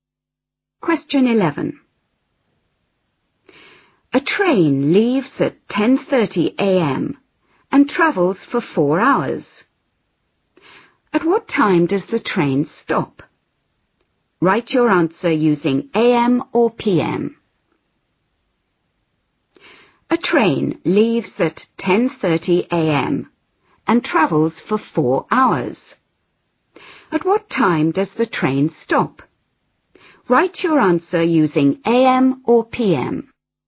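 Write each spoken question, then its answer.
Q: At what time does the train stop?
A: 2:30 p.m.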